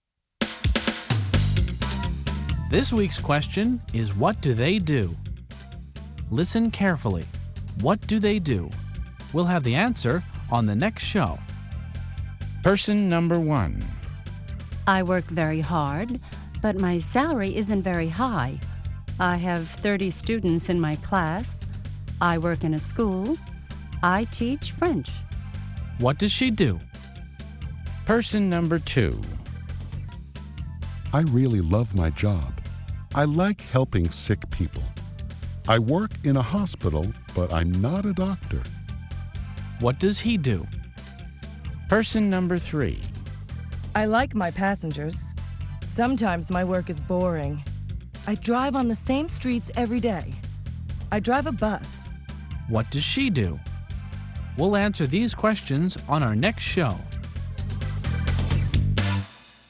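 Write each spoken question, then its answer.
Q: What does she do?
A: She's a French teacher.

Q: What does she do?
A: She's a bus driver.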